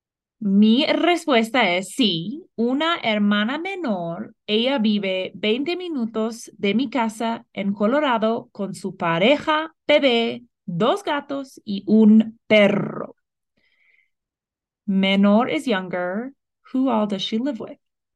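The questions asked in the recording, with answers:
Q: Who all does she live with?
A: Her partner, a baby, two cats and a dog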